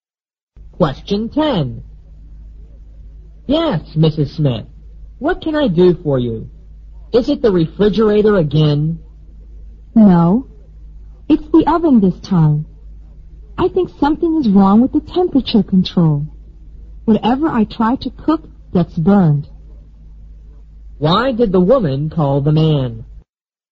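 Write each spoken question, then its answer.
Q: Why did the woman call the man?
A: To have her oven repaired (its temperature control is faulty)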